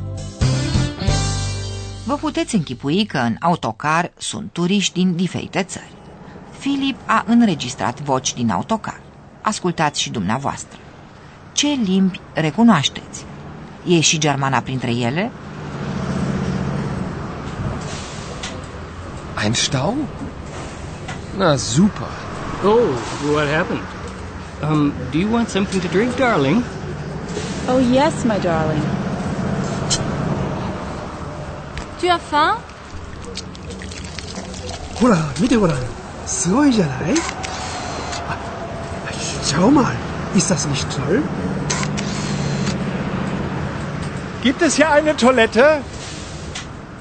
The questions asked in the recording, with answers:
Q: Ce limbi recunoașteți?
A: Ați auzit probabil vorbindu-se englezește și franțuzește.

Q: E și germana printre ele?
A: Germana probabil ați recunoscut-o.